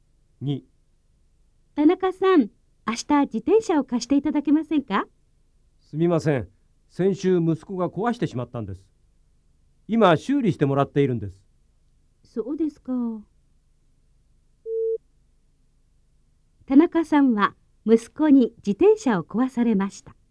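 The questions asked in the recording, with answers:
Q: 田中さんは息子に自転車を壊されました。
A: ○(正しい)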